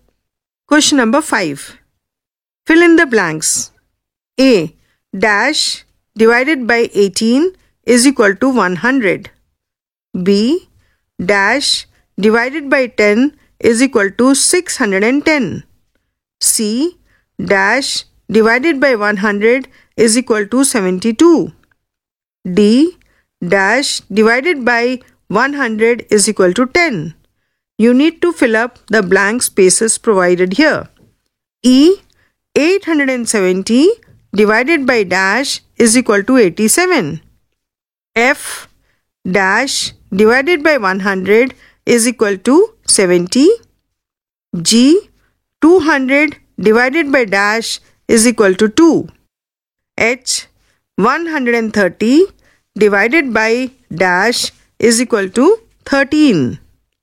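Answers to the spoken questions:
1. 1800
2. 6100
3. 7200
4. 1000
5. 10
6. 7000
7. 100
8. 10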